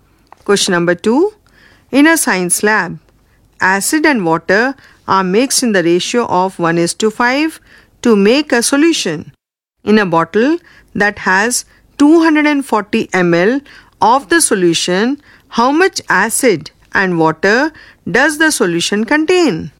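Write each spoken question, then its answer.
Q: In a bottle that has 240 ml of the solution, how much acid and water does the solution contain?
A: 40 ml acid and 200 ml water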